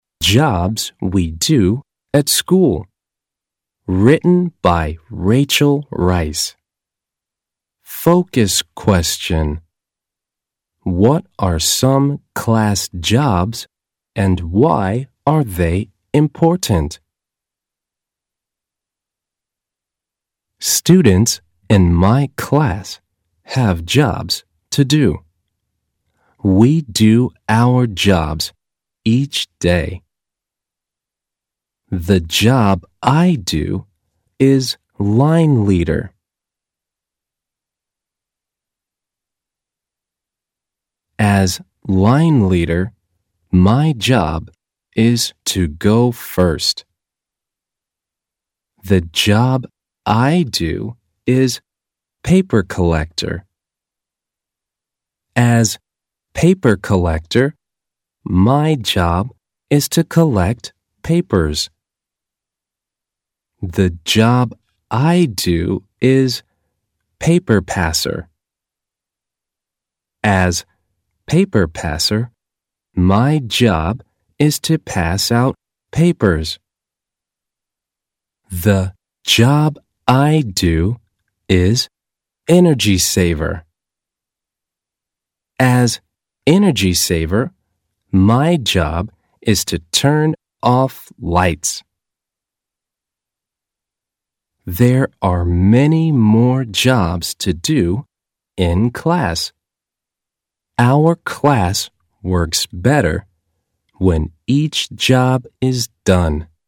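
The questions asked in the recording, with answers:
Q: What are some class jobs and why are they important?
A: The class jobs include line leader, paper collector, paper passer and energy saver. They are important because the class works better when each job is done.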